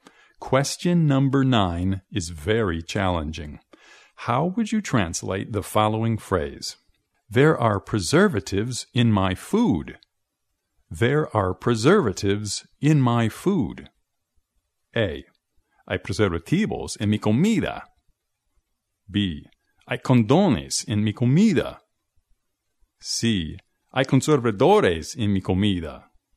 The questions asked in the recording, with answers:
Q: There are preservatives in my food.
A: Hay conservadores en mi comida, por supuesto.